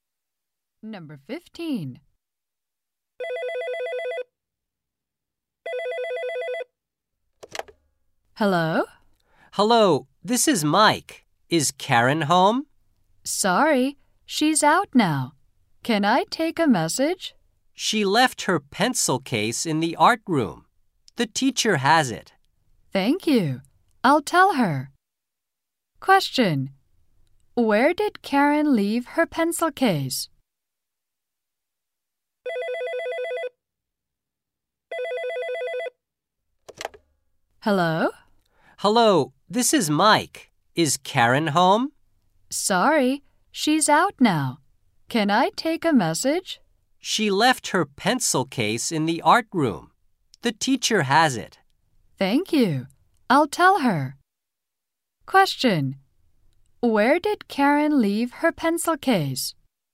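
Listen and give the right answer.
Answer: In the art room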